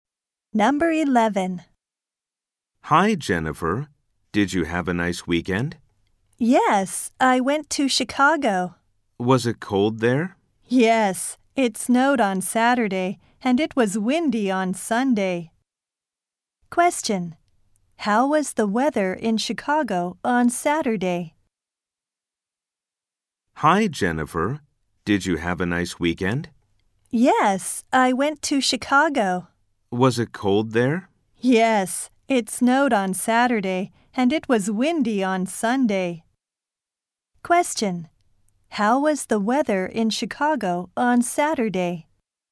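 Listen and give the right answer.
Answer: It snowed.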